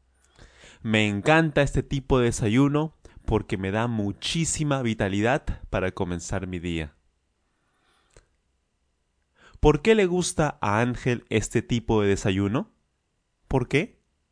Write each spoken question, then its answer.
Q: ¿Por qué le gusta a Ángel este tipo de desayuno?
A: Porque le da muchísima energía, muchísima vitalidad para comenzar su día.